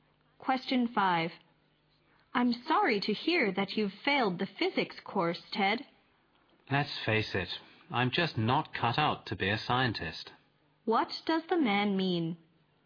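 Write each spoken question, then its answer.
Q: What does the man mean?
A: He is not suited to being a scientist.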